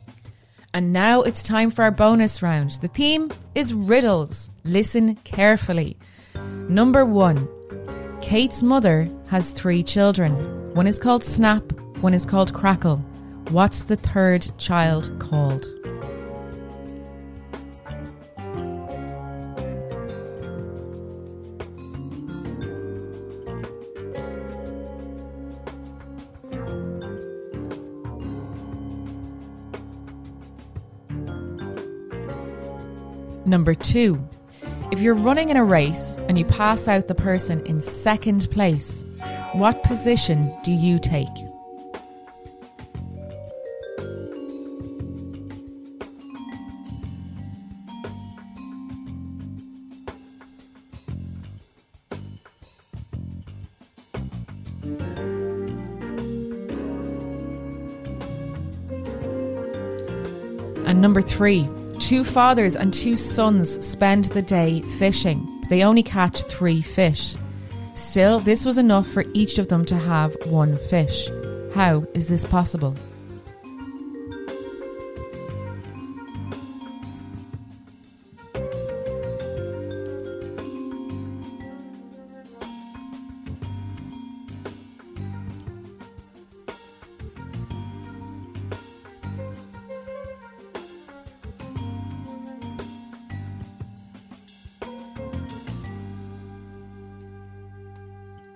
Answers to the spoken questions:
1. But it's Kate's mother, so the third child is called Kate.
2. The answer is now you're in second place.
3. There are only three people fishing.